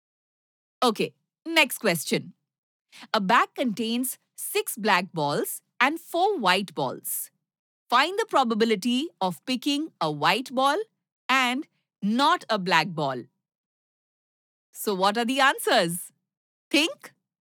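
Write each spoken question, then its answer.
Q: Find the probability of picking a white ball and not a black ball.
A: 4/10 = 2/5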